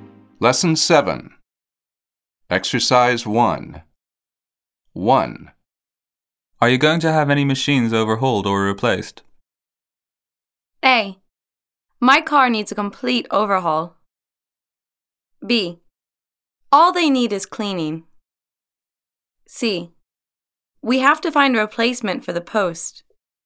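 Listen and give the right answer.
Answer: B: All they need is cleaning.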